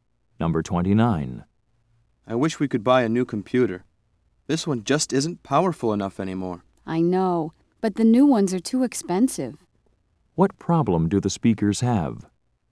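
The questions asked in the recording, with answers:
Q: What problem do the speakers have?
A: They can't afford a new computer.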